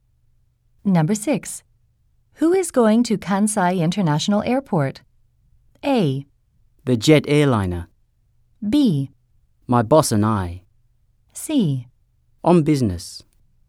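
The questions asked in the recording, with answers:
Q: Who is going to Kansai International Airport?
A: B: My boss and I.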